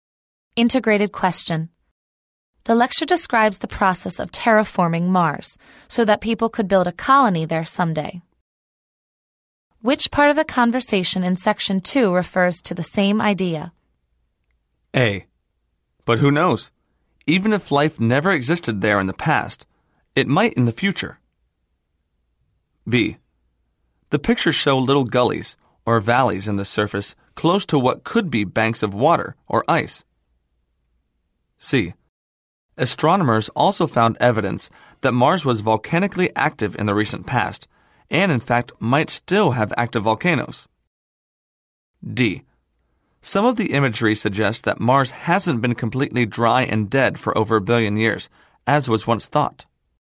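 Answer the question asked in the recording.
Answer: A: But who knows? Even if life never existed there in the past, it might in the future.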